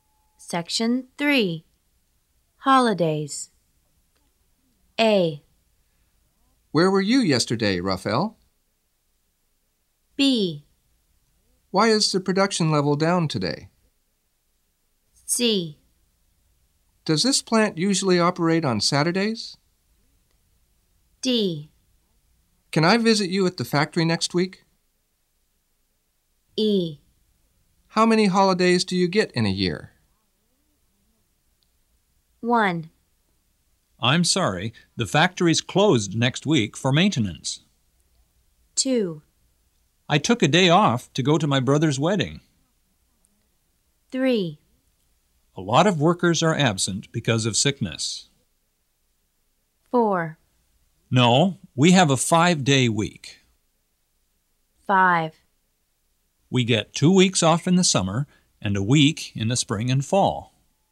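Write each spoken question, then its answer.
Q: I'm sorry, the factory's closed next week for maintenance.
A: D: Can I visit you at the factory next week?

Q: I took a day off to go to my brother's wedding.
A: A: Where were you yesterday, Raphael?

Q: A lot of workers are absent because of sickness.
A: B: Why is the production level down today?

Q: No, we have a 5-day week.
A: C: Does this plant usually operate on Saturdays?

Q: We get 2 weeks off in the summer and a week in the spring and fall.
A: E: How many holidays do you get in a year?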